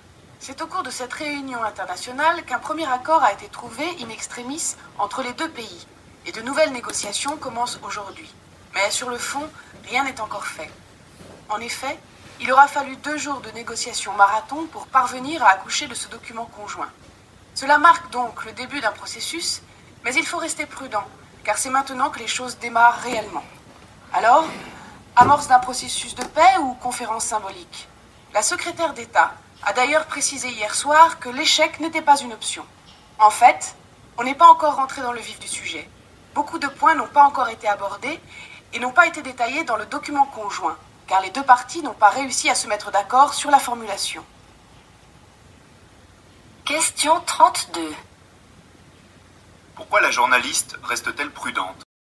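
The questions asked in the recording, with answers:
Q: Pourquoi la journaliste reste-t-elle prudente?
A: Parce que rien n'est encore fait : ce n'est que le début du processus, les négociations sur le fond commencent seulement et beaucoup de points n'ont pas encore été abordés.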